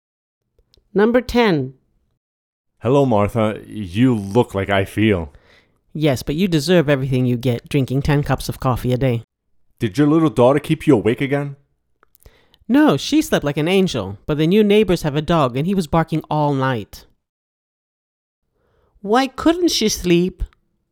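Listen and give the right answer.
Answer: The neighbors' dog was barking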